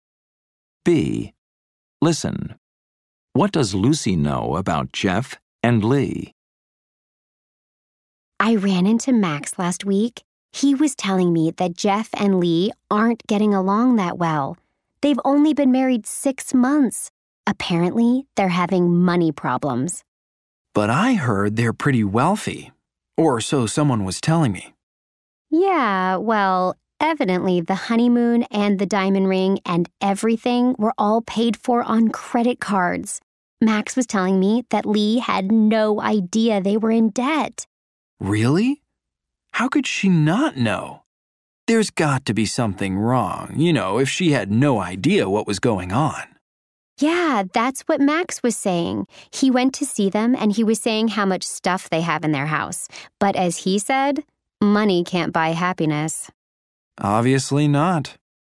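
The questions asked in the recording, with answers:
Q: What does Lucy know about Jeff and Lee?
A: They aren't getting along well and have money problems: their honeymoon and ring were paid for on credit cards, and Lee didn't know they were in debt.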